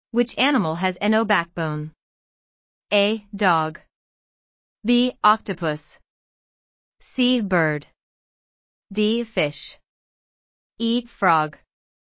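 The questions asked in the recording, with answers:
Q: Which animal has no backbone?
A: B: Octopus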